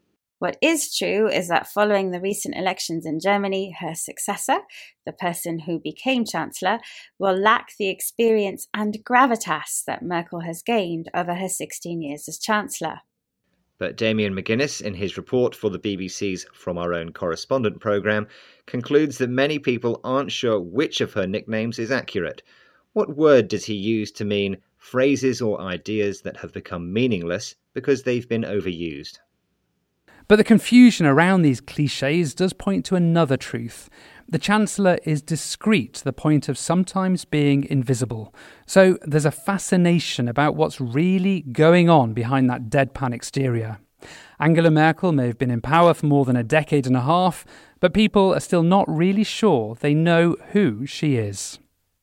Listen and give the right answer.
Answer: He used the word clichés to mean phrases or ideas that have become meaningless because they've been overused.